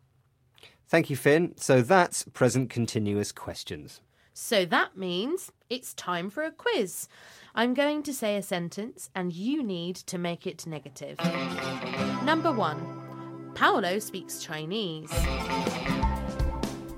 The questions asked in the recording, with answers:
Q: Number one, Paolo speaks Chinese.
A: Paolo doesn't speak Chinese.